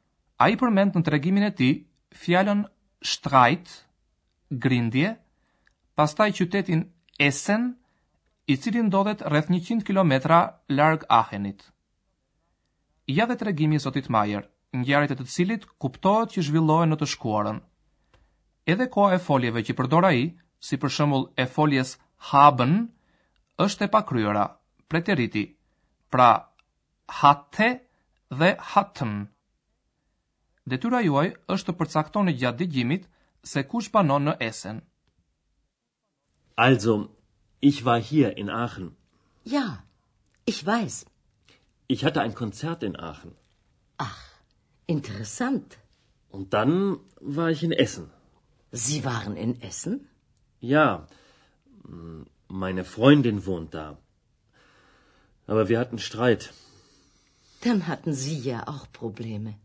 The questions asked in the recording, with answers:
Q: Detyra juaj është të përcaktoni gjatë dëgjimit se kush banon në esen.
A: Pra në Essen banon Mikesha e Zotit Majer.